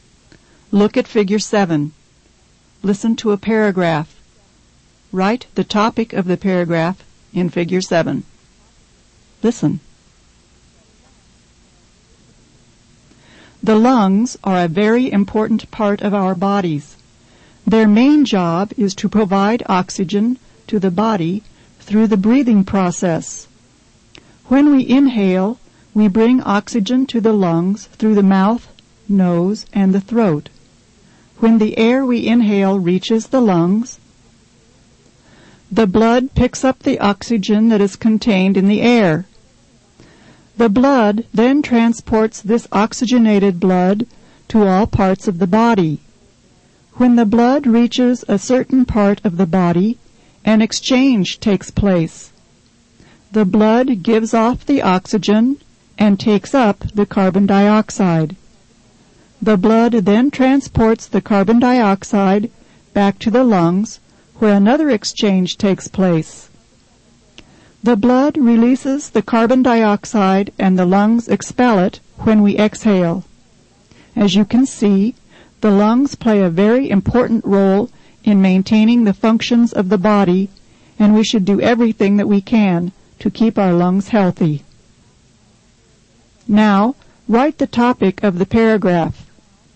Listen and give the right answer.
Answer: The topic should be something like the lungs.